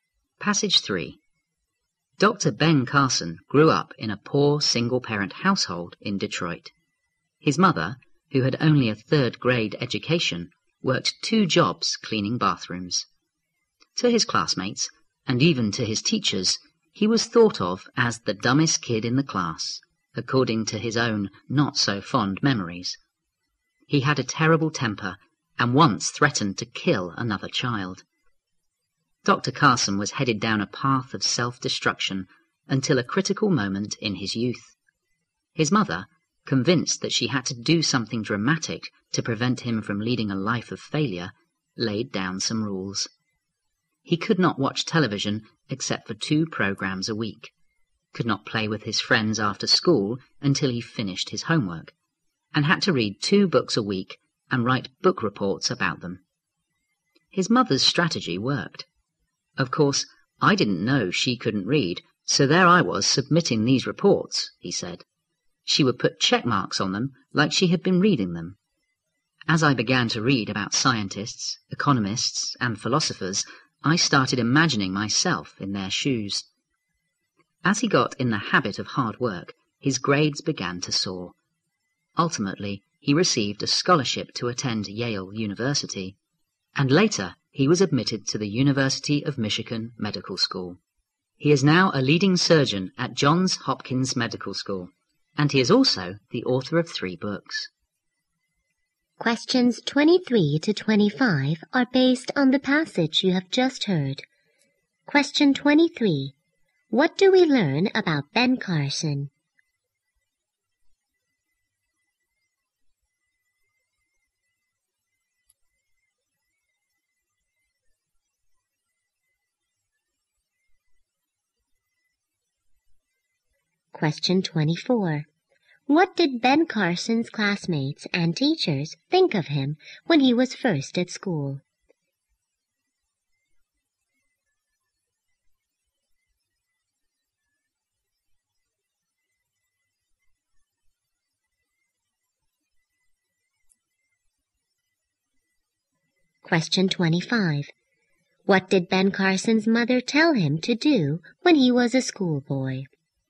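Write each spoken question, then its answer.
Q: What do we learn about Ben Carson?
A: He grew up poor in a single-parent household and became a leading surgeon.

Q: What did Ben Carson's classmates and teachers think of him when he was first at school?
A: That he was the dumbest kid in the class.

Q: What did Ben Carson's mother tell him to do when he was a schoolboy?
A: Read two books a week and write book reports about them.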